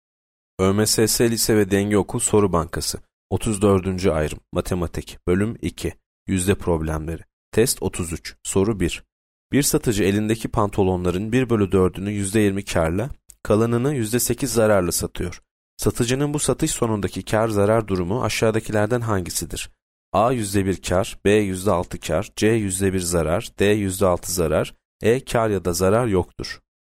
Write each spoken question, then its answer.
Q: Satıcının bu satış sonundaki kâr zarar durumu aşağıdakilerden hangisidir?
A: C. %1 zarar.